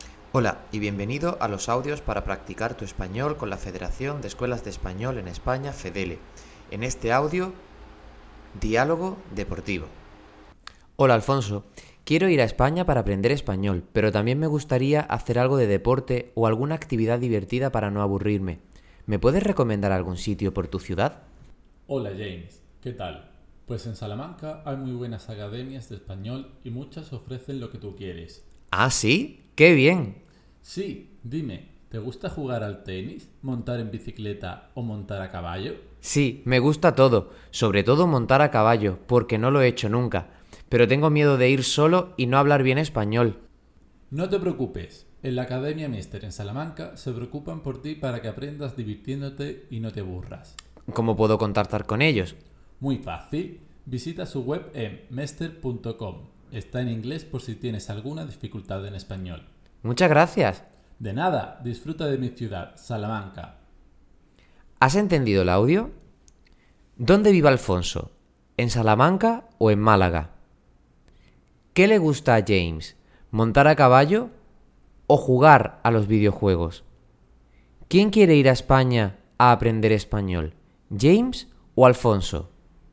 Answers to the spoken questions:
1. Salamanca
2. montar a caballo
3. James